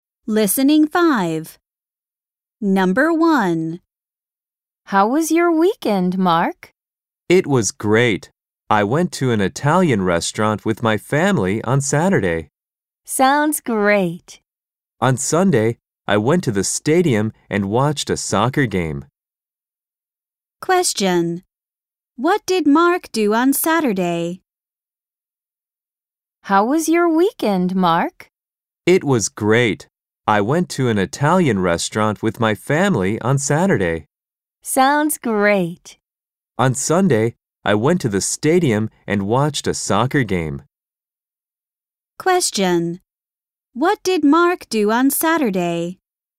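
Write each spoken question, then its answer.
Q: What did Mark do on Saturday?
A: He went to an Italian restaurant with his family.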